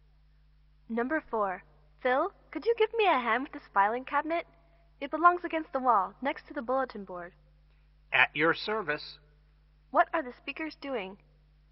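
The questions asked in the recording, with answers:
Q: What are the speakers doing?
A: Moving a filing cabinet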